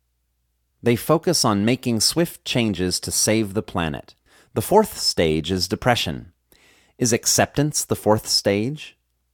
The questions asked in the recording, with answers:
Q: Is acceptance the fourth stage?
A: No, acceptance is not the fourth stage.